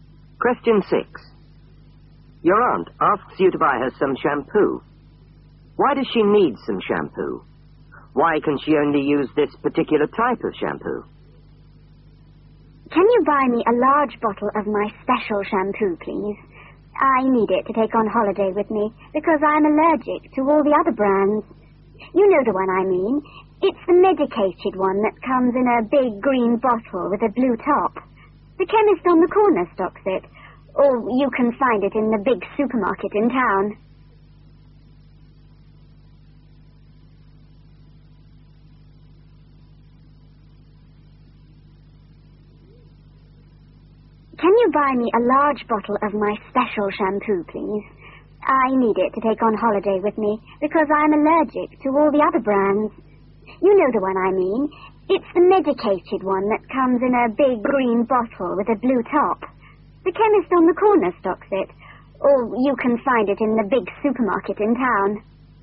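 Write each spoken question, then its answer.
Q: Why does she need some shampoo?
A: To take on holiday

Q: Why can she only use this particular type of shampoo?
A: She's allergic to all the other brands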